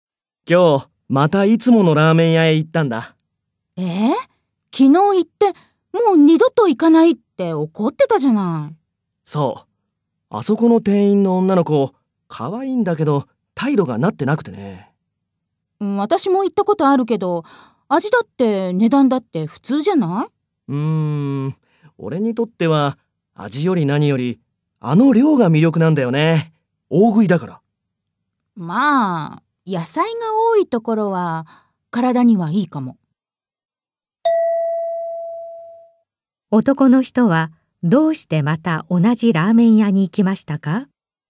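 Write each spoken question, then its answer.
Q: 男の人はどうしてまた同じラーメン屋に行きましたか?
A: 量が多いから(大食いなので、量が魅力だから)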